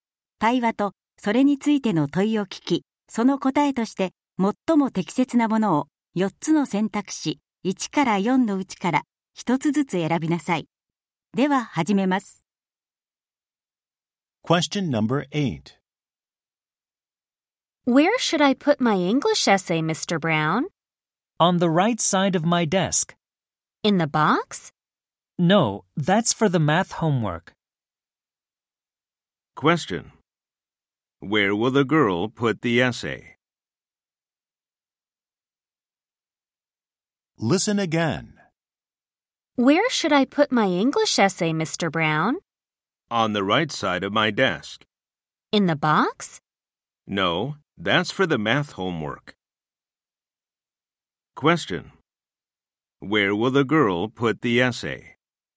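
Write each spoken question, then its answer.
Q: Where will the girl put the essay?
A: On the right side of Mr. Brown's desk (not in the box)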